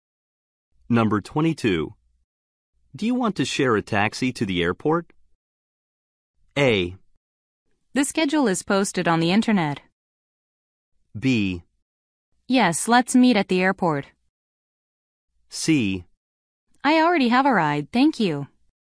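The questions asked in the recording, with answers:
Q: Do you want to share a taxi to the airport?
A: C: I already have a ride, thank you.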